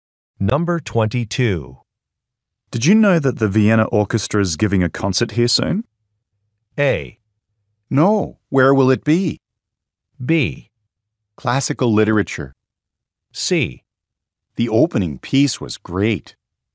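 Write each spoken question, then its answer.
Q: Did you know that the Vienna Orchestra is giving a concert here soon?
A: A: No. Where will it be?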